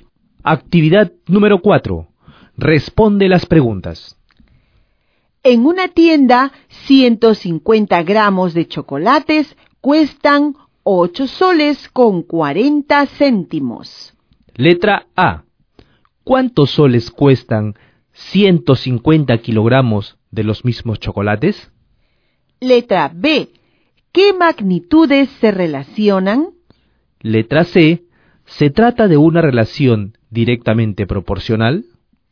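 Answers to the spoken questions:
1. 8400 soles
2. El peso (en gramos) y el precio (en soles)
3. Sí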